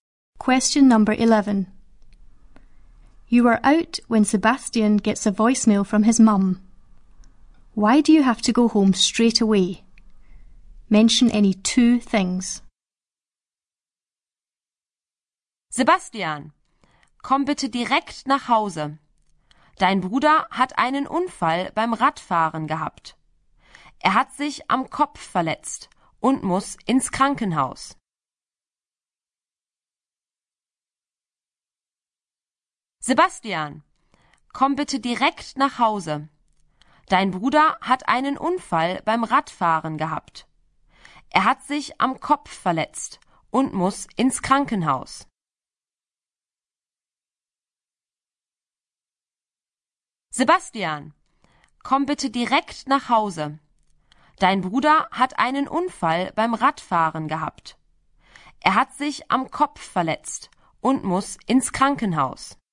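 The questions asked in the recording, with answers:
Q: Why do you have to go home straight away?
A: Any two: his brother had a cycling accident; he hurt his head; he has to go to hospital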